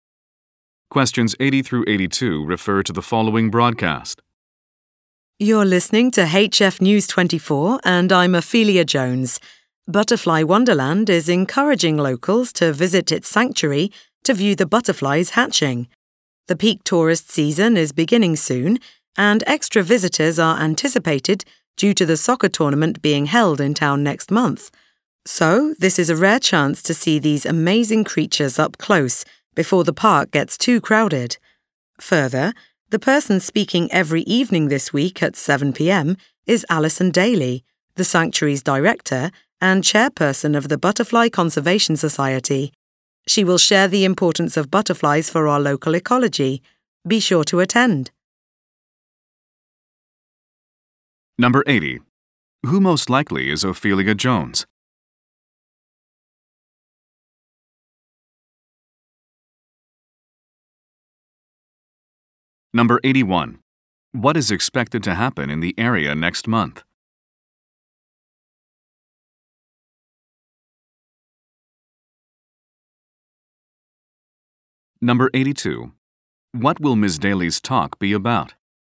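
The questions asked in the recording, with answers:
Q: Who most likely is Ophelia Jones?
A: A news reporter

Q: What is expected to happen in the area next month?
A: A soccer tournament

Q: What will Ms. Daly's talk be about?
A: The importance of butterflies for the local ecology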